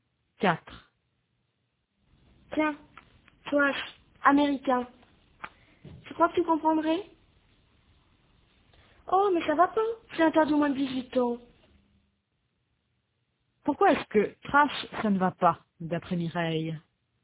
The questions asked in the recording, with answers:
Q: Pourquoi est-ce que trash, ça ne va pas, d'après Mireille?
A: Parce que c'est interdit au moins de 18 ans.